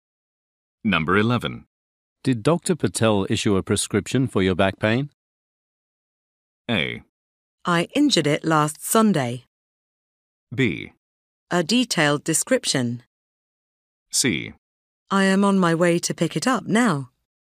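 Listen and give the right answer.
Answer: C: I am on my way to pick it up now.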